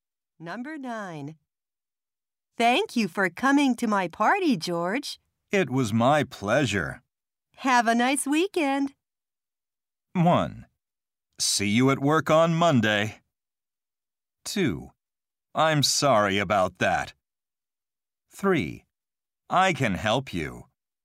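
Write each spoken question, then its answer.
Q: Have a nice weekend.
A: 1: See you at work on Monday.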